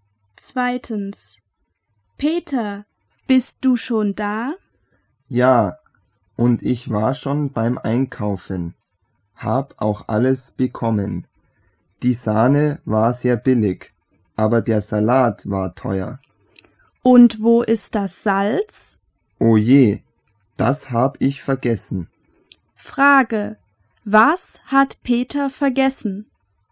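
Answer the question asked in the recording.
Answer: Das Salz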